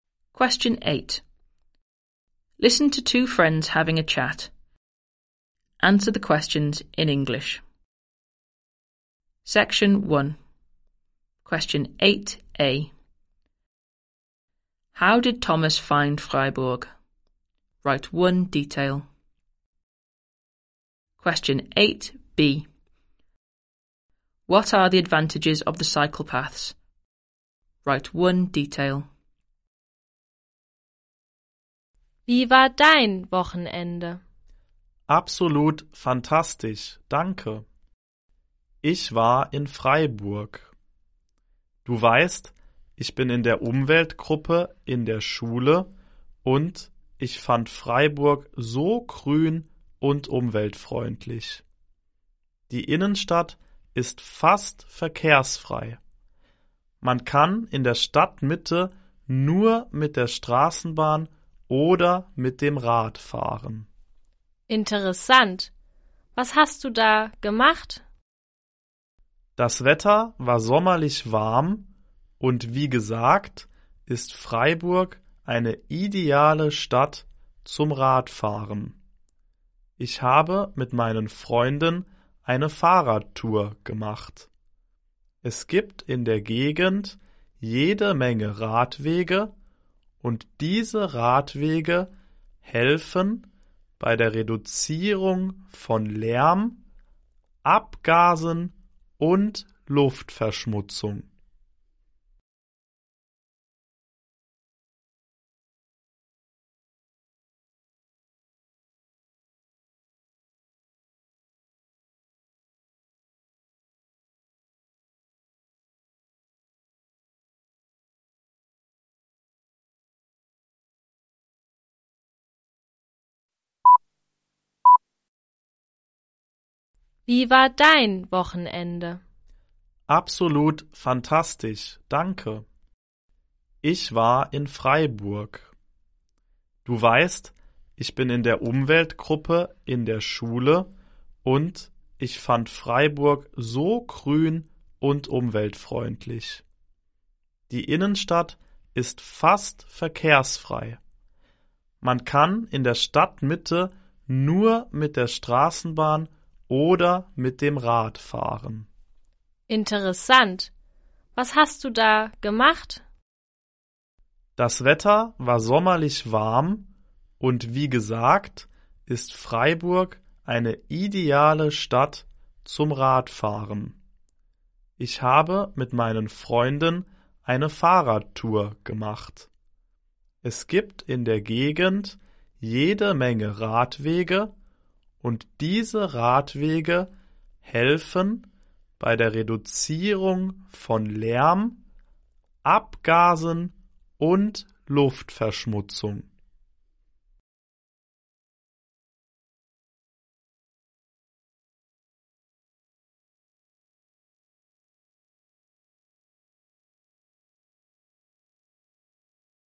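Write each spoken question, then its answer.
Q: How did Thomas find Freiburg?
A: Very green and environmentally friendly

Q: What are the advantages of the cycle paths?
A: They help reduce noise, exhaust fumes and air pollution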